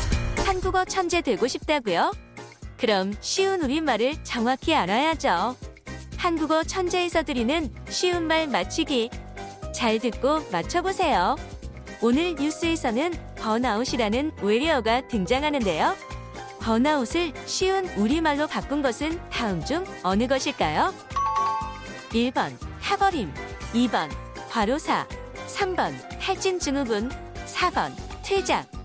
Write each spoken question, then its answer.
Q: 번아웃을 쉬운 우리말로 바꾼 것은 다음 중 어느 것일까요?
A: 한국에서는 공식적으로 이제 탈진 증후군이라는 단어를 사용하고 있는데요.